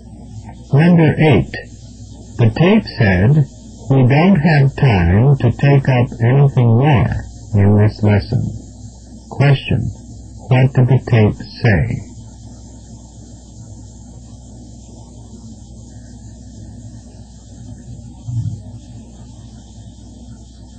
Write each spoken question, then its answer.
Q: What did the tape say?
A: There is no time to introduce new material.